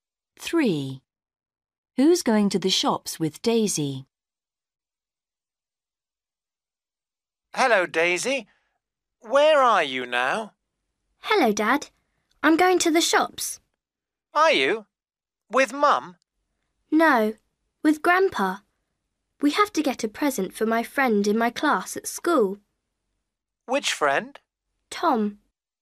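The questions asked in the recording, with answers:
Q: Who's going to the shops with Daisy?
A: Grandpa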